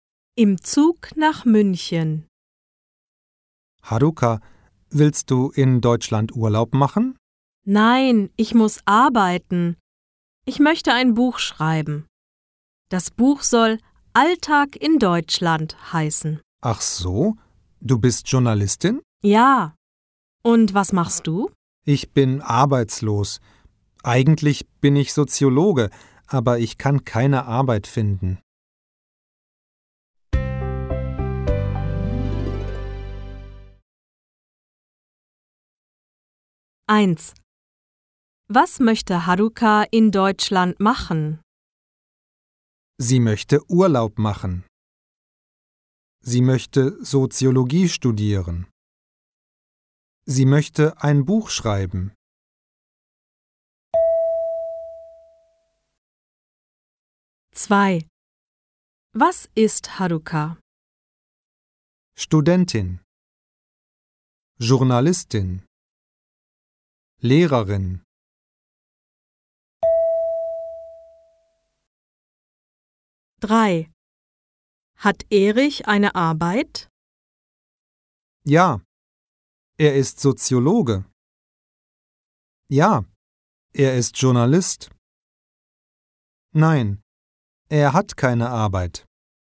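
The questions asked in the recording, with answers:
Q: Was möchte Haruka in Deutschland machen?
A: Sie möchte ein Buch schreiben.

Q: Was ist Haruka?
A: Journalistin

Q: Hat Erich eine Arbeit?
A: Nein, er hat keine Arbeit.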